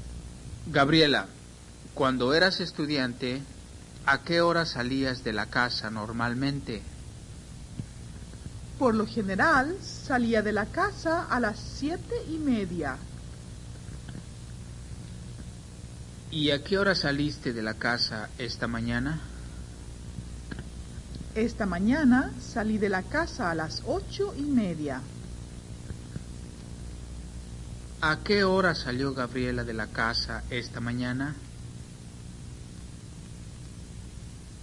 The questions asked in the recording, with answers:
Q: ¿A qué hora salió Gabriela de la casa esta mañana?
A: Gabriela salió de la casa a las 8:30.